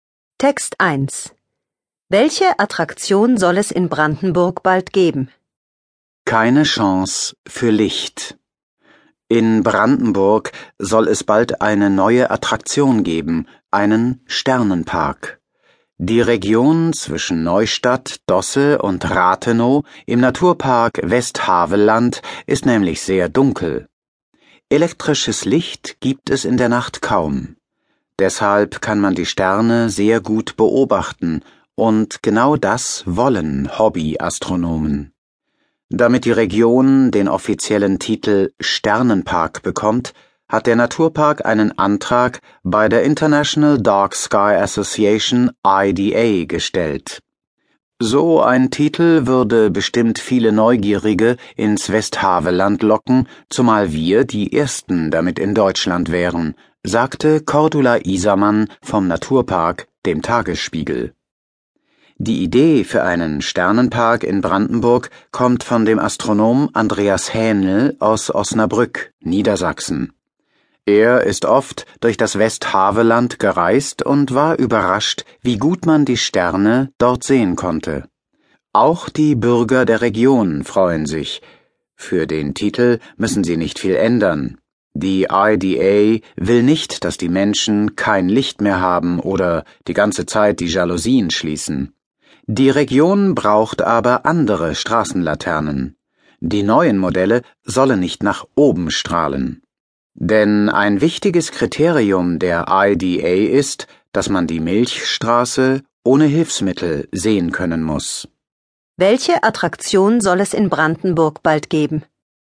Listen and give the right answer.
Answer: Es soll dort bald einen Sternenpark geben.